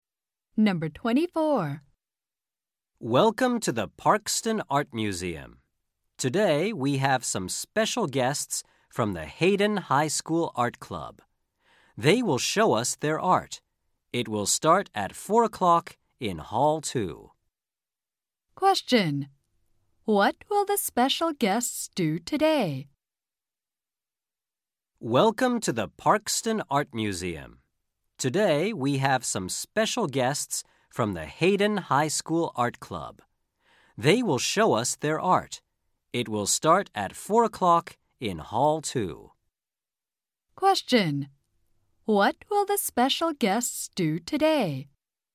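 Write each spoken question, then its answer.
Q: What will the special guests do today?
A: Show their art.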